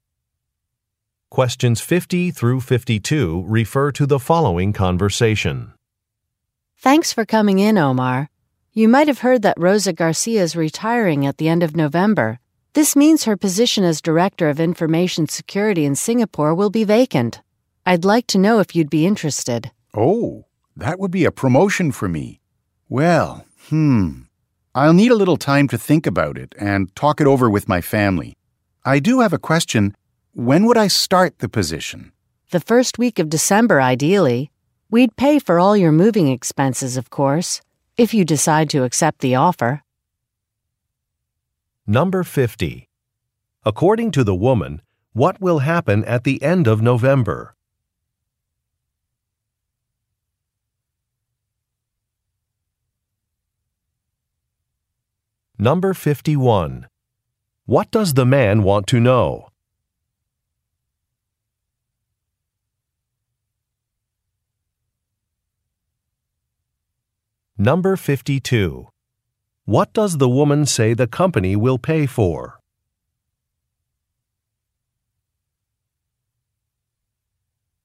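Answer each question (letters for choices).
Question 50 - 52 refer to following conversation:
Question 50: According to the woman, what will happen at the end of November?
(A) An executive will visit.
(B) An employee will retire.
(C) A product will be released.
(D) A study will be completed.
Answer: B

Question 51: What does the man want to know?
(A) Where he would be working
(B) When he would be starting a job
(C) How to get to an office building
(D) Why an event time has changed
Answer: B

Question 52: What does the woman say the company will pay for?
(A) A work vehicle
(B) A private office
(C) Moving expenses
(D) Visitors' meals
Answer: C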